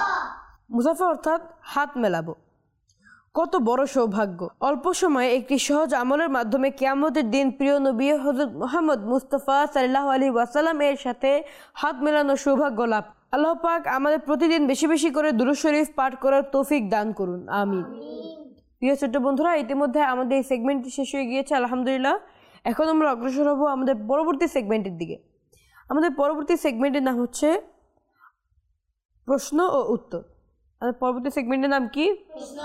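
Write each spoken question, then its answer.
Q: আমাদের পরবর্তী সেগমেন্টের নাম কি?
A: প্রশ্ন ও উত্তর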